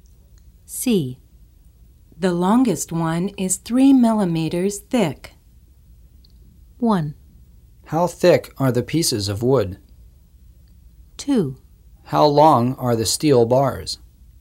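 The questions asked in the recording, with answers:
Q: How thick are the pieces of wood?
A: 1: How thick are the pieces of wood?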